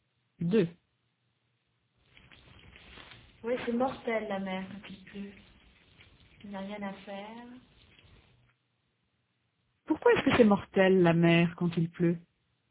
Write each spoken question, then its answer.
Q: Pourquoi est-ce que c'est mortel la mer quand il pleut?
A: 'Parce qu'il n'y a rien à faire.